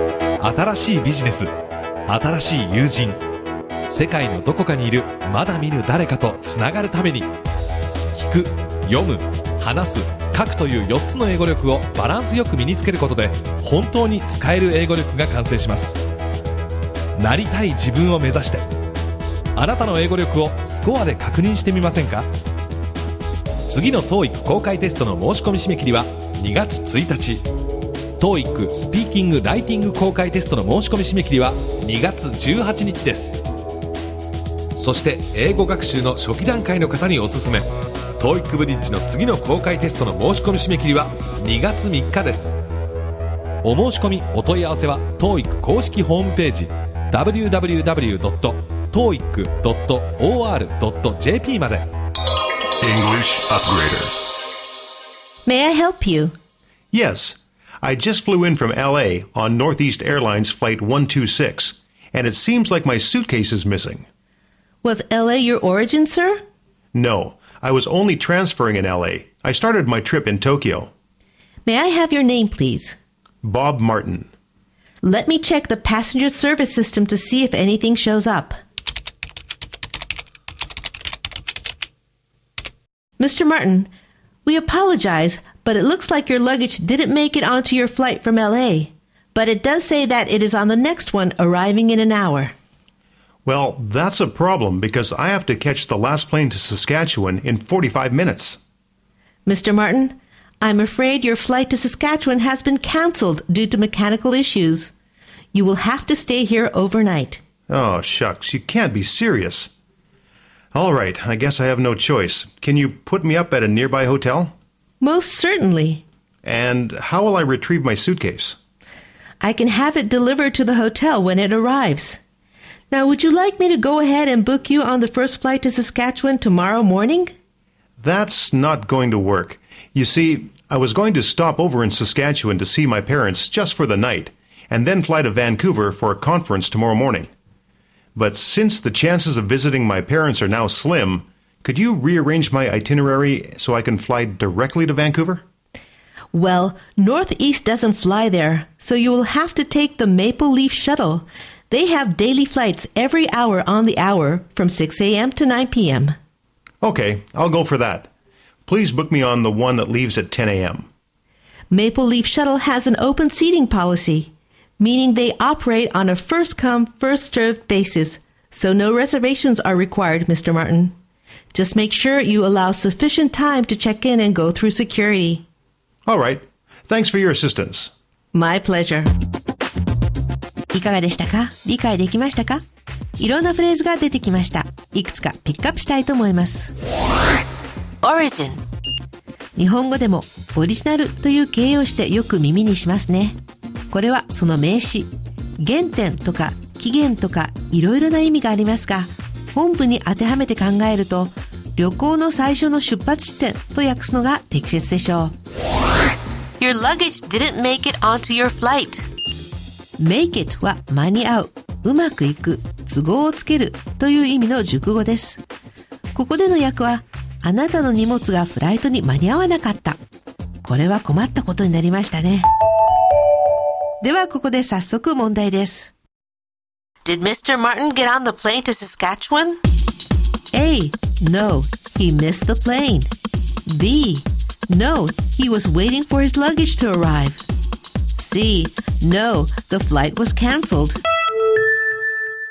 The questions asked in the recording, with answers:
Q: Did Mr. Martin get on the plane to Saskatchewan?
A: 正解は C のフライトはキャンセルされたです。